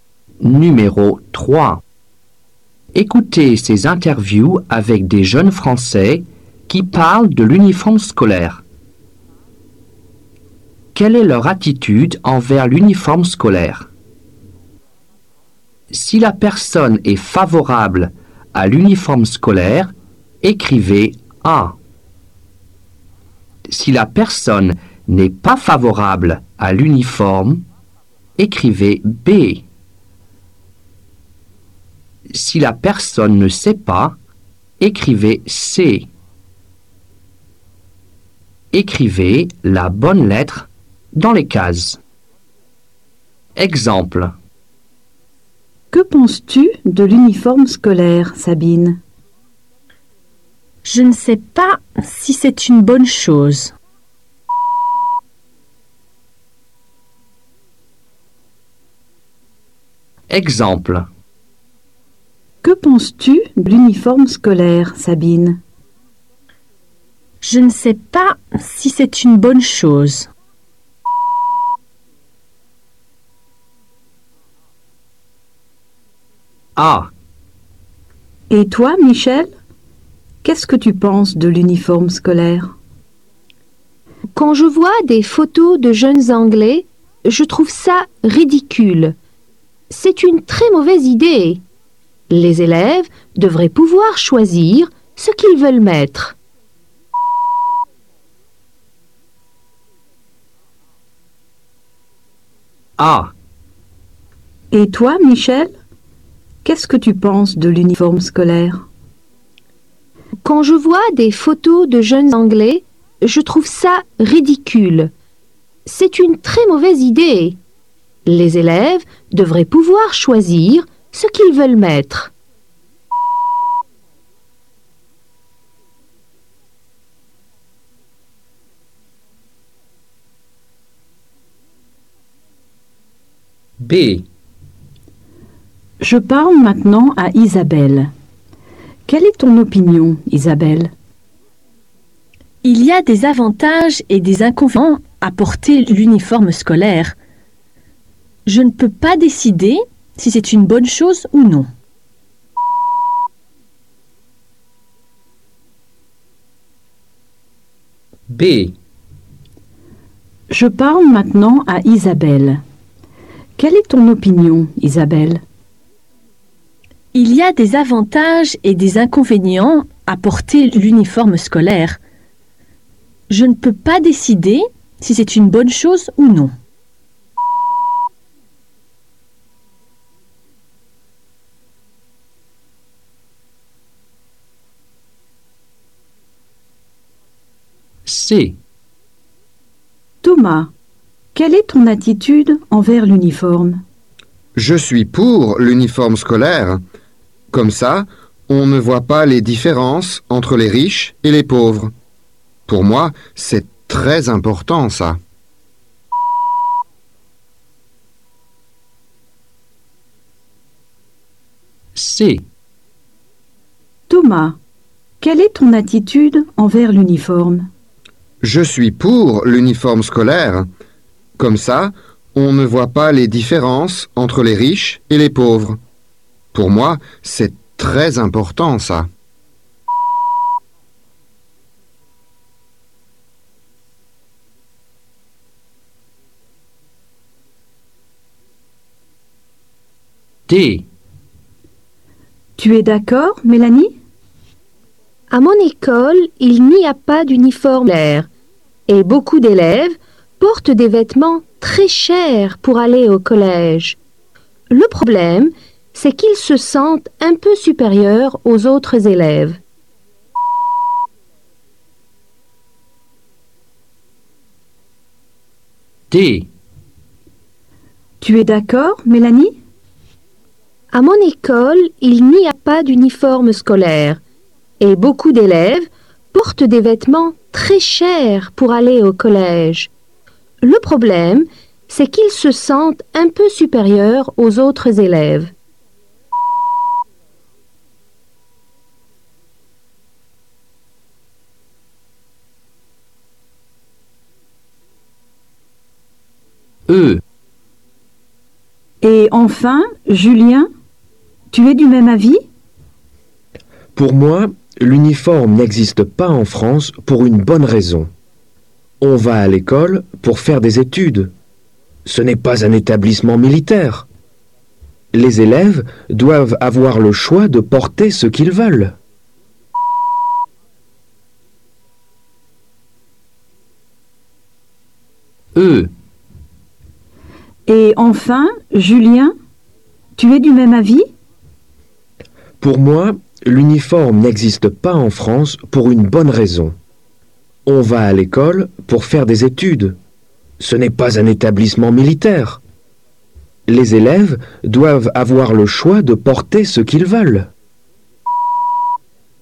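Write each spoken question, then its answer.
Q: Quelle est leur attitude envers l'uniforme scolaire ?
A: B: la personne n'est pas favorable à l'uniforme

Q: Quelle est leur attitude envers l'uniforme scolaire ?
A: C: la personne ne sait pas

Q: Quelle est leur attitude envers l'uniforme scolaire ?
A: A: la personne est favorable à l'uniforme scolaire

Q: Quelle est leur attitude envers l'uniforme scolaire ?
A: B: la personne n'est pas favorable à l'uniforme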